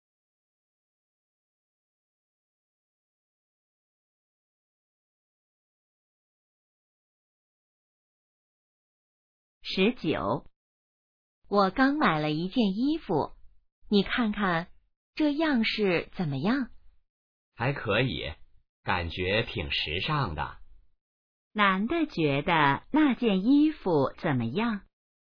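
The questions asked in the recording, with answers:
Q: 男的觉得那件衣服怎么样?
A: 挺时尚的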